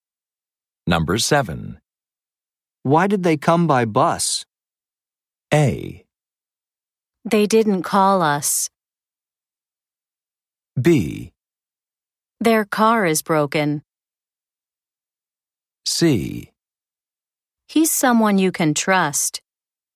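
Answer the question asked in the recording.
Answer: B: Their car is broken.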